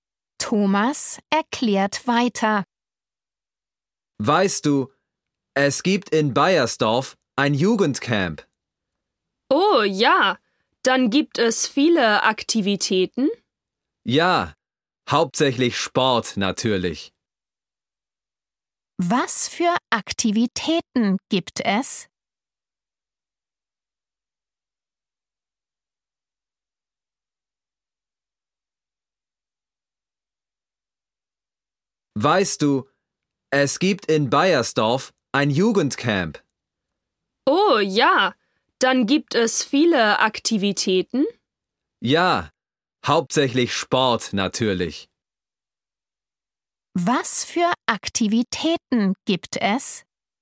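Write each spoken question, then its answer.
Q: Was für Aktivitäten gibt es?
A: Hauptsächlich Sport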